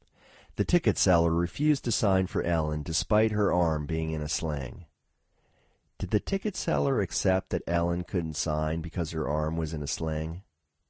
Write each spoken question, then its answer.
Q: Did the ticket seller accept that Ellen couldn't sign because her arm was in a sling?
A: No, the ticket seller didn't accept that Ellen couldn't sign because her arm was in a sling.